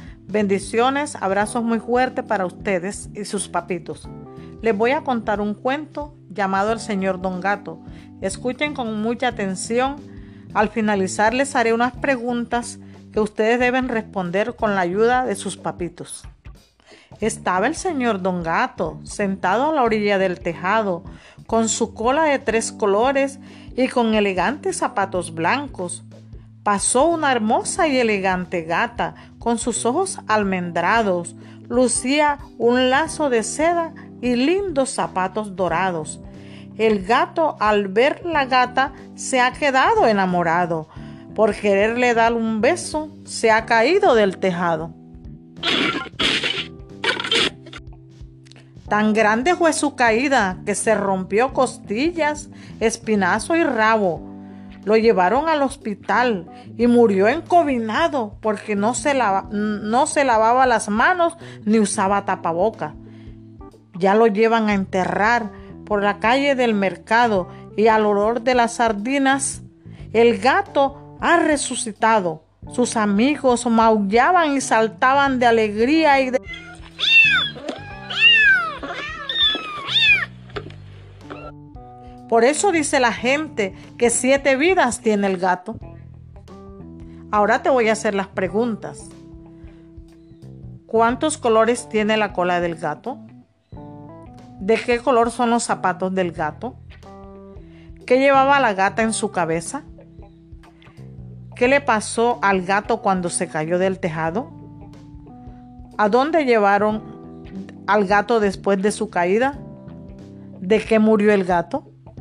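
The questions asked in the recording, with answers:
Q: ¿Cuántos colores tiene la cola del gato?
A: Tres colores

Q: ¿De qué color son los zapatos del gato?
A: Blancos

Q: ¿Qué llevaba la gata en su cabeza?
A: Un lazo de seda

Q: ¿Qué le pasó al gato cuando se cayó del tejado?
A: Se rompió costillas, espinazo y rabo

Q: ¿A dónde llevaron al gato después de su caída?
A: Al hospital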